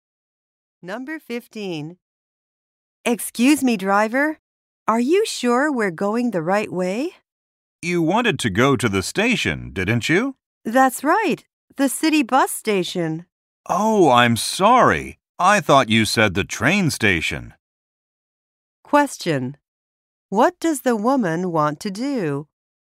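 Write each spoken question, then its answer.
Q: What does the woman want to do?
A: Go to the city bus station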